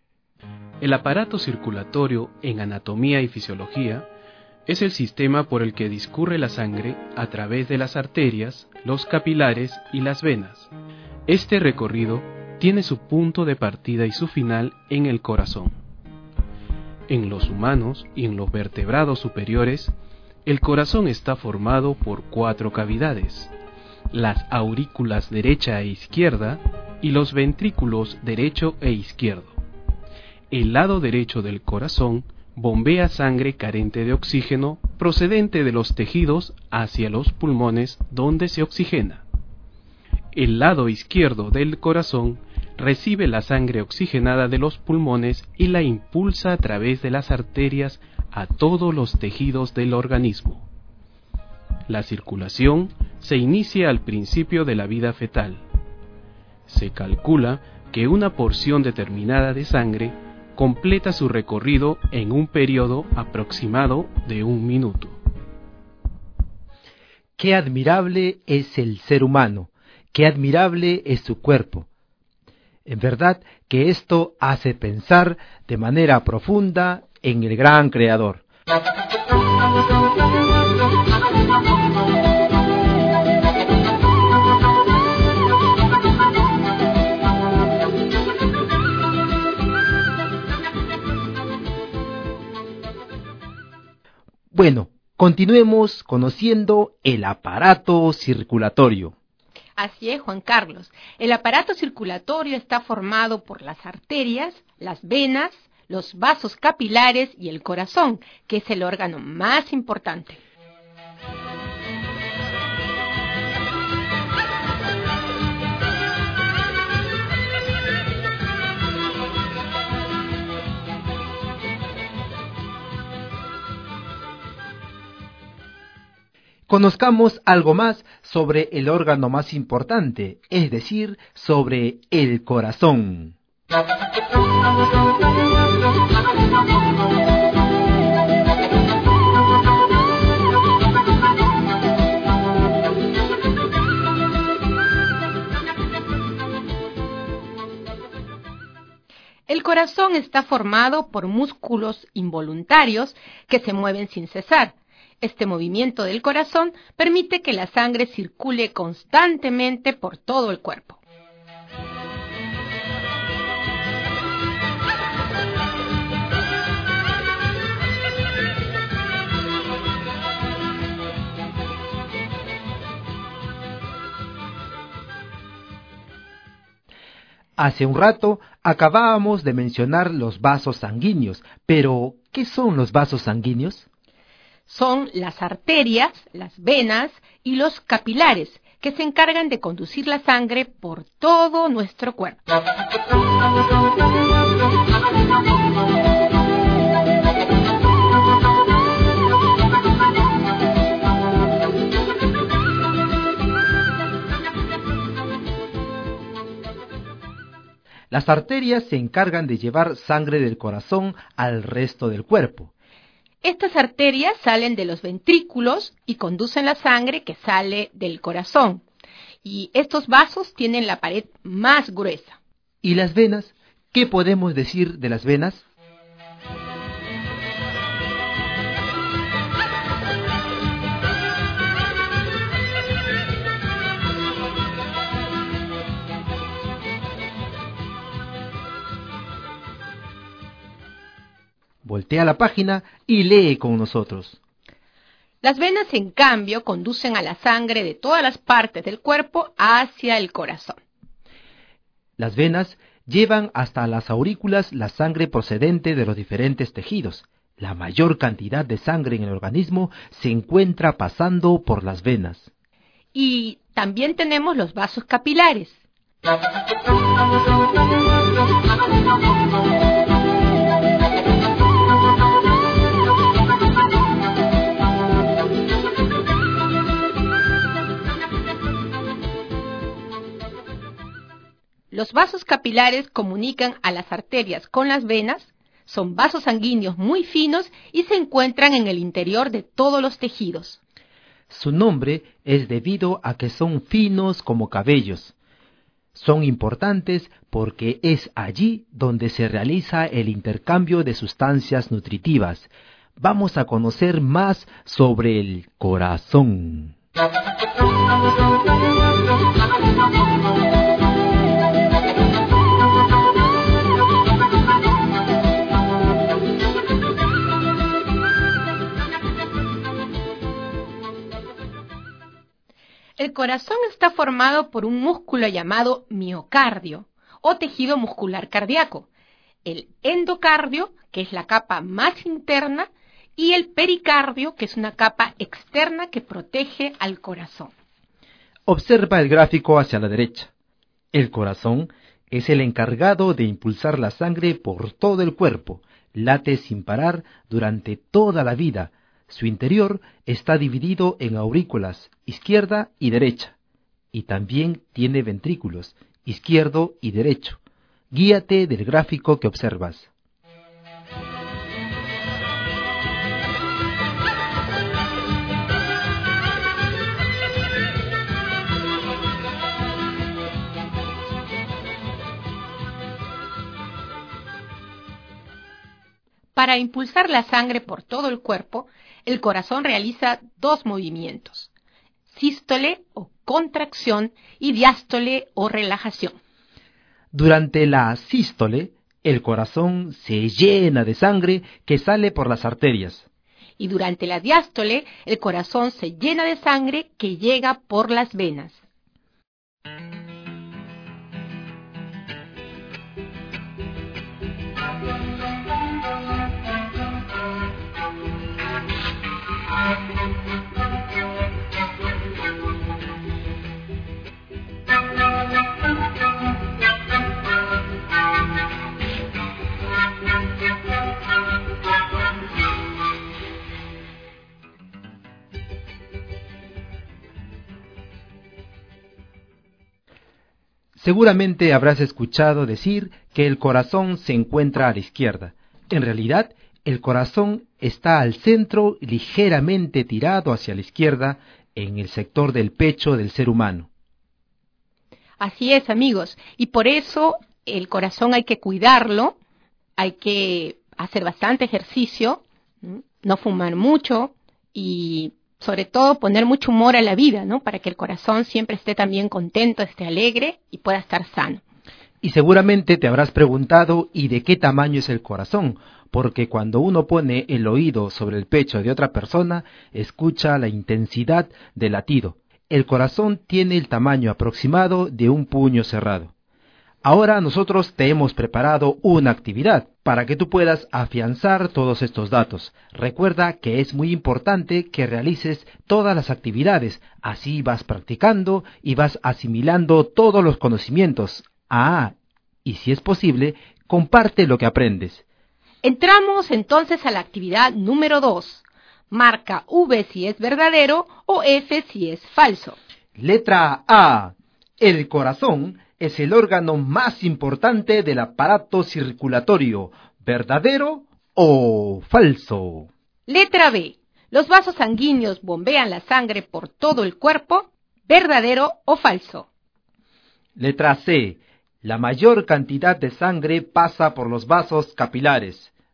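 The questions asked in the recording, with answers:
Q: Letra A. El corazón es el órgano más importante del aparato circulatorio.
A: Verdadero

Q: Letra B. ¿Los vasos sanguíneos bombean la sangre por todo el cuerpo?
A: Falso

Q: Letra C. La mayor cantidad de sangre pasa por los vasos capilares.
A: Falso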